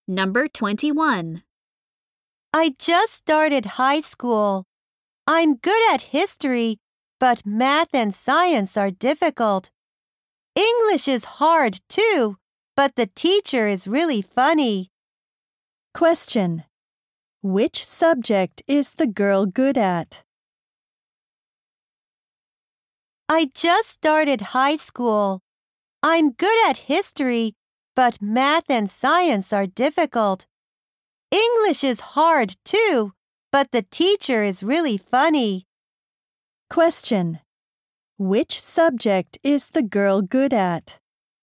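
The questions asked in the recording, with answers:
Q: Which subject is the girl good at?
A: History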